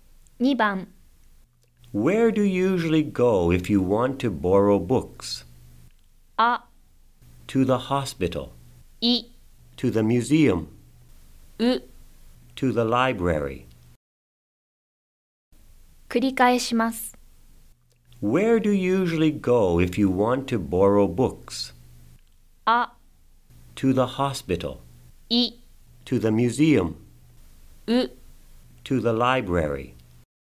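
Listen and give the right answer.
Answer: U: To the library.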